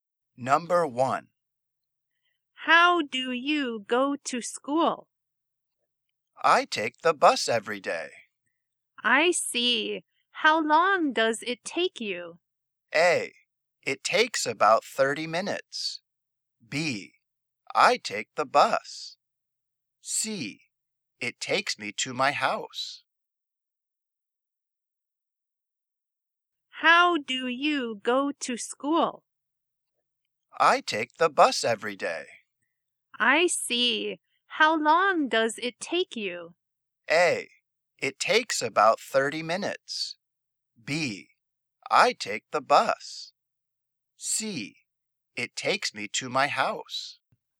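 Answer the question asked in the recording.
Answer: A: It takes about 30 minutes.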